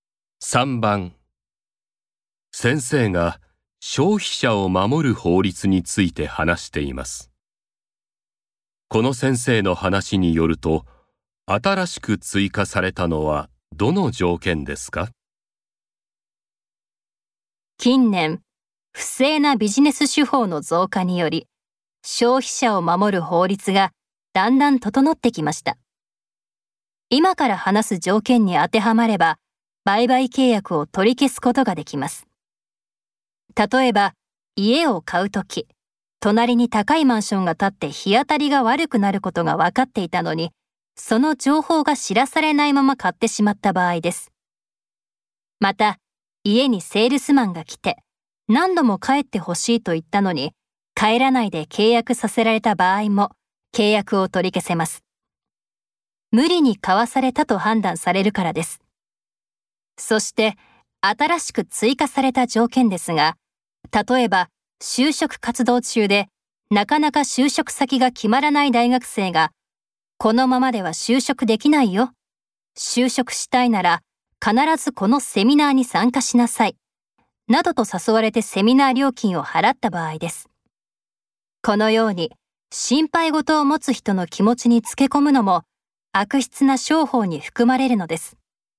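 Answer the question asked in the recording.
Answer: 不安や心配事を持つ人の気持ちにつけ込んで契約させた場合(例:就職できないと言われてセミナー料金を払わされた場合)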